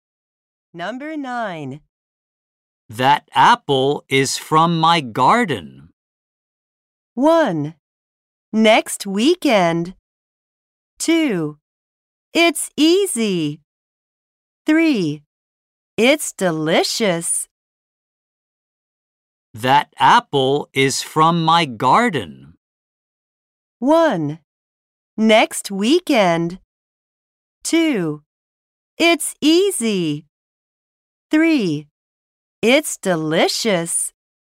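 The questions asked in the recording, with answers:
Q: That apple is from my garden.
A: 3: It's delicious.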